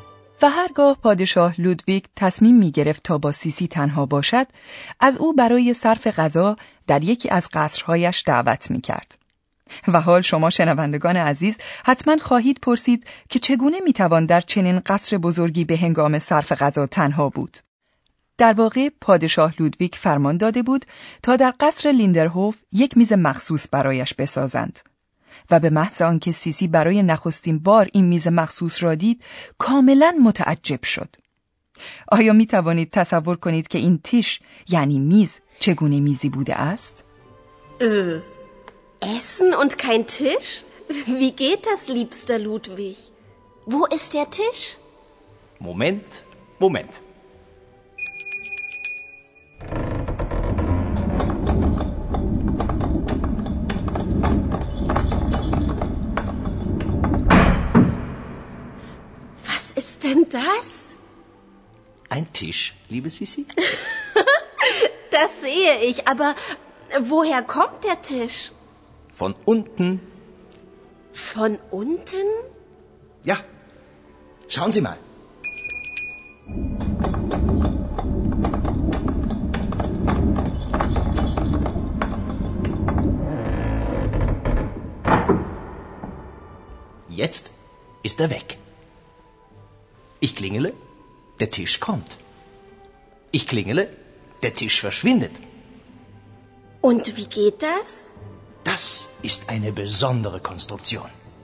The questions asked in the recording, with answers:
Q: آیا می توانید تصور کنید که این تیش یعنی میز چگونه میزی بوده است؟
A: پادشاه لودویگ دوم هم دقیقا از همین شیوه برای ساختن این میز متحرک بهره گرفته بود.